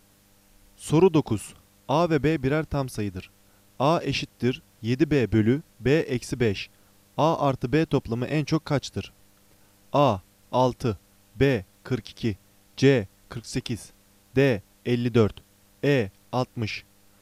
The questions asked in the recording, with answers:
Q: A artı B toplamı en çok kaçtır?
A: Doğru cevap C 48.